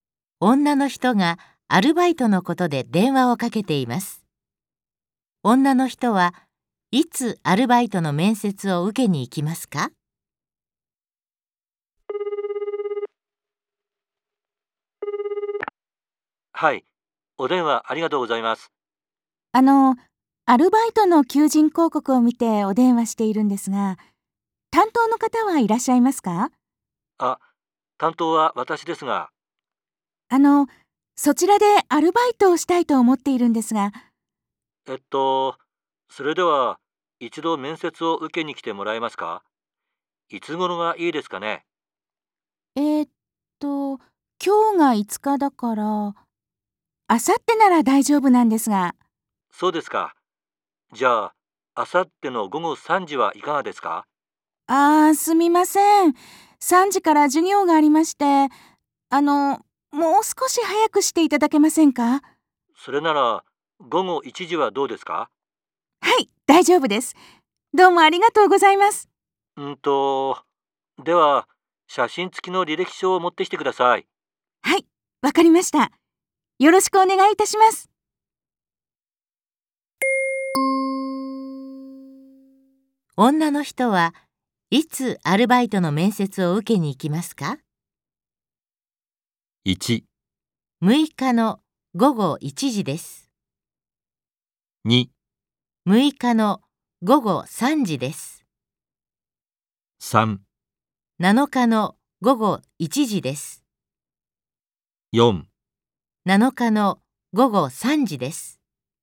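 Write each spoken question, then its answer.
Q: 女の人はいつアルバイトの面接を受けに行きますか?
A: 3: 7日の午後1時です。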